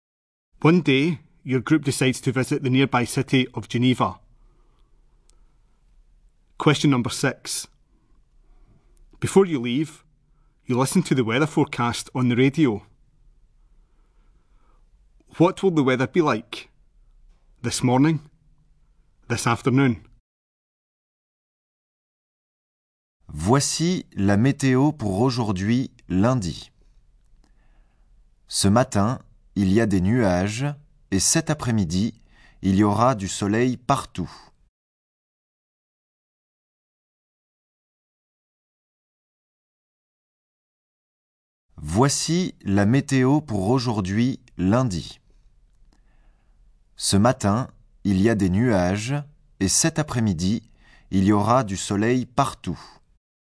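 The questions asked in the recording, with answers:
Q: What will the weather be like?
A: Cloudy this morning, sunny everywhere this afternoon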